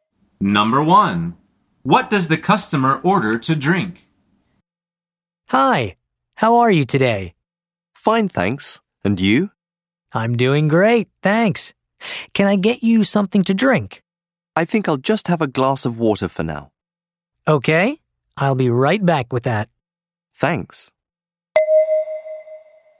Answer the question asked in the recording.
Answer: The answer is water. He says, I'll just have a glass of water.